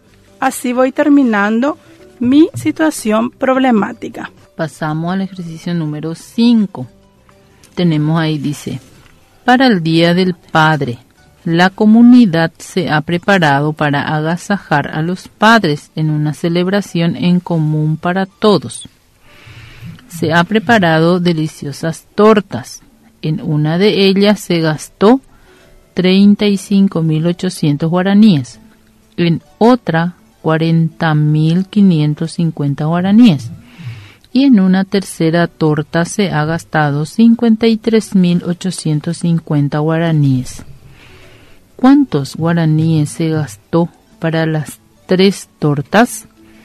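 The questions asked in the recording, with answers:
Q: ¿Cuántos guaraníes se gastó para las tres tortas?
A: 130.200 guaraníes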